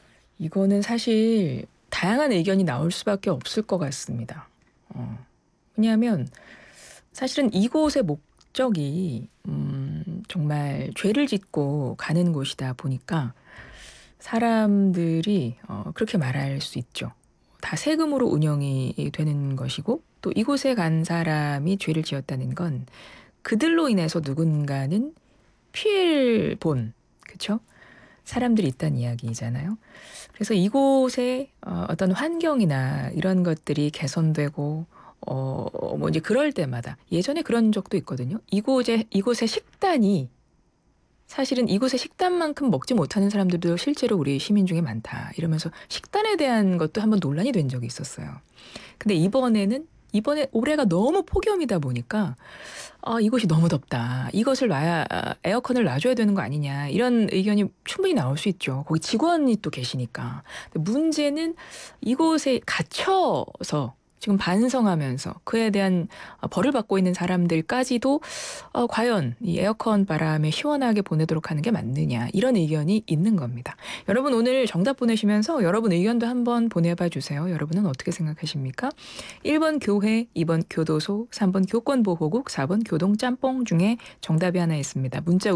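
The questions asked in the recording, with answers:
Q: 1번 교회, 2번 교도소, 3번 교권보호국, 4번 교동짬뽕 중에 정답이 하나 있습니다.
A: 2: 교도소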